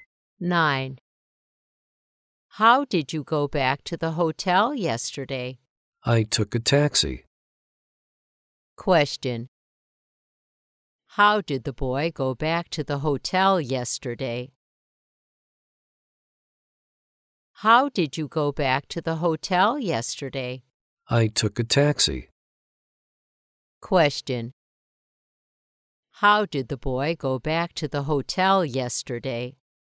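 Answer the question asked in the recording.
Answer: By taxi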